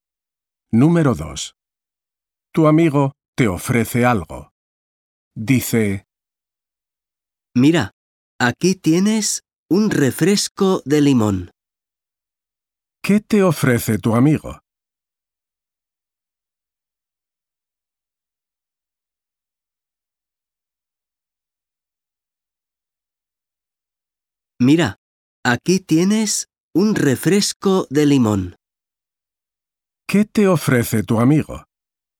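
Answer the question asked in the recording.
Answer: Un refresco de limón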